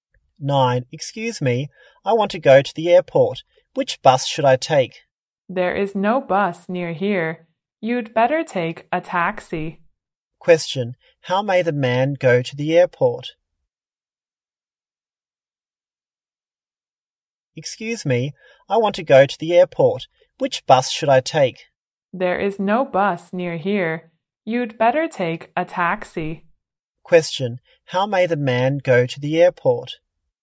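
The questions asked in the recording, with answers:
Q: How may the man go to the airport?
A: By taxi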